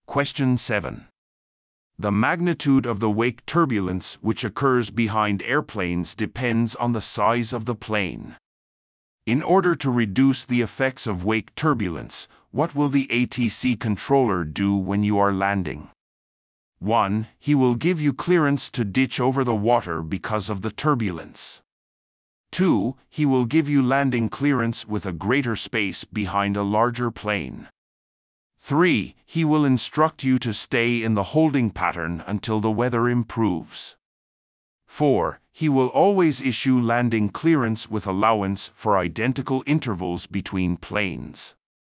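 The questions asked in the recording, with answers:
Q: In order to reduce the effects of wake turbulence, what will the ATC controller do when you are landing?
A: 2: He will give you landing clearance with a greater space behind a larger plane.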